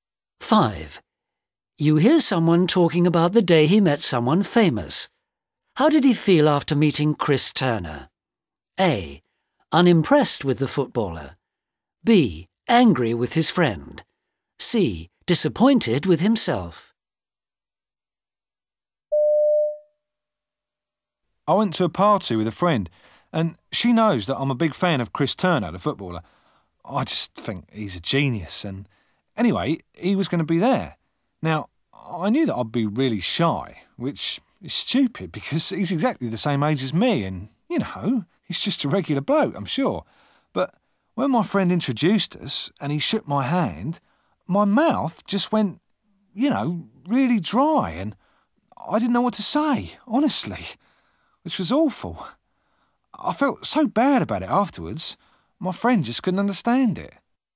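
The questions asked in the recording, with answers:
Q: How did he feel after meeting Chris Turner?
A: C: Disappointed with himself.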